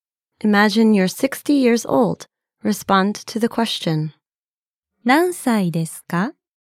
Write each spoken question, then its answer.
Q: 何歳ですか?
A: 60歳です。